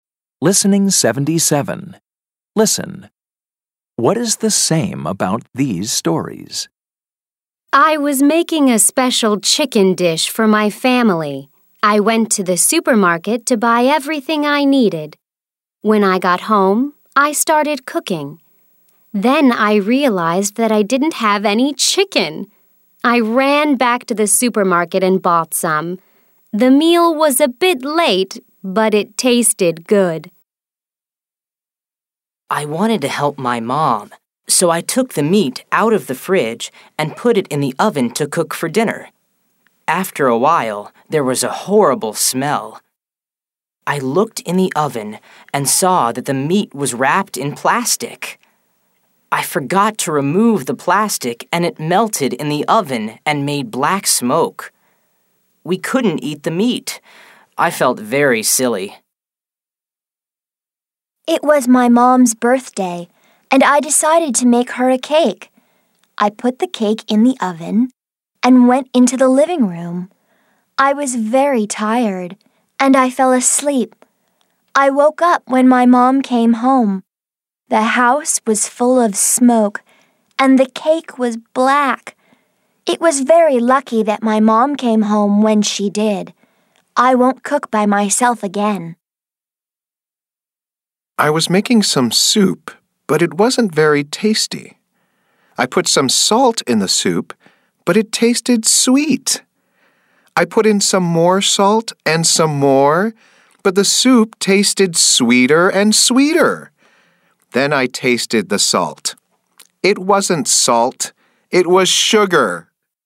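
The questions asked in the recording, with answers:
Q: What is the same about these stories?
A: They are all about cooking mistakes/problems.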